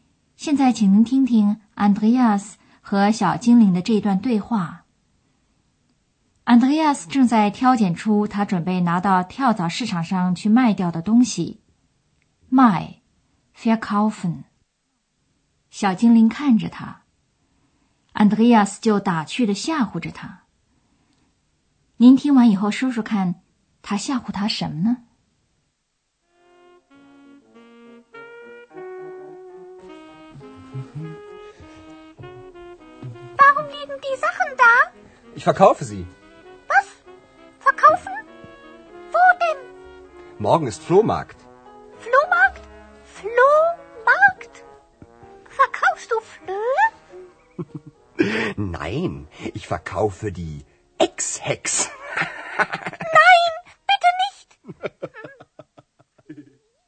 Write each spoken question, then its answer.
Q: 您听完以后说说看,他吓唬他什么呢?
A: Andreas 吓唬小精灵说,他也要把它卖掉,就像卖掉其他的东西一样。